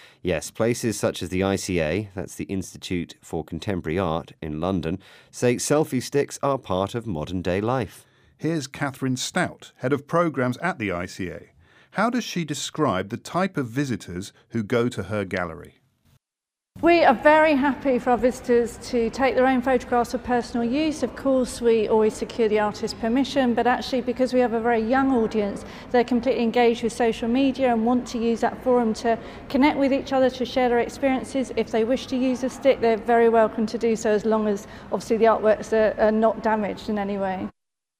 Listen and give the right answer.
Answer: So the people who visit that gallery are young and use social media a lot.